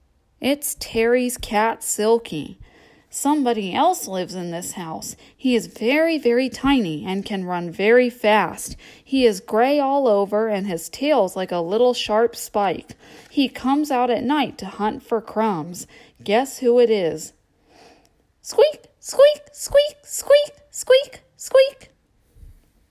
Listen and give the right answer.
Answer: It's the mouse in Terry's cellar.